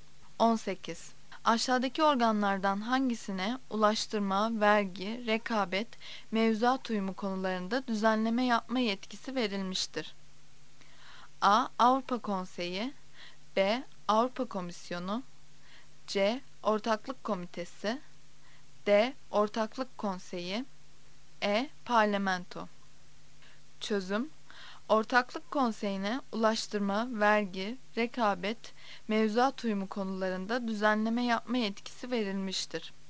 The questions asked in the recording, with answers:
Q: Aşağıdaki organlardan hangisine ulaştırma, vergi, rekabet, mevzuat uyumu konularında düzenleme yapma yetkisi verilmiştir?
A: Yanıt D'dir. D. Ortaklık konseyi.